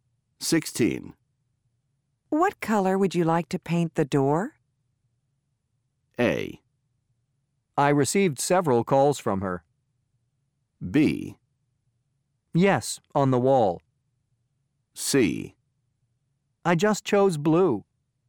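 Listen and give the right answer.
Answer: C: I just chose blue.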